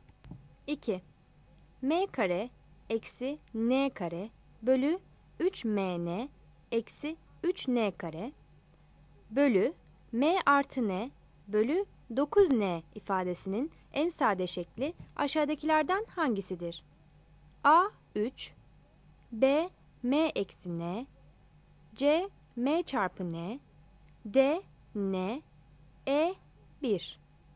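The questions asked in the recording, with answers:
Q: M kare eksi n kare bölü 3mn eksi 3n kare bölü m artı n bölü 9n ifadesinin en sade şekli aşağıdakilerden hangisidir?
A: A: 3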